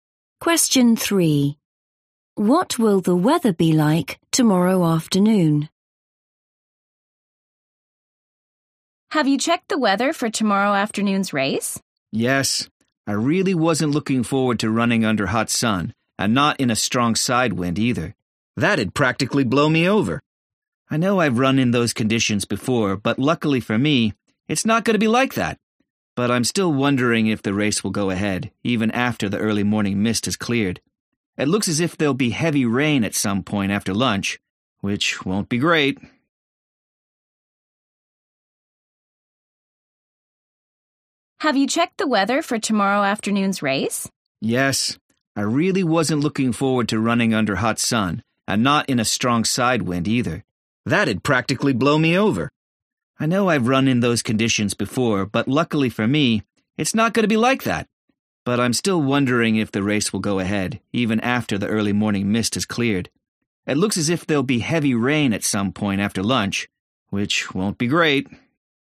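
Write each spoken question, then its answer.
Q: What will the weather be like tomorrow afternoon?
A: heavy rain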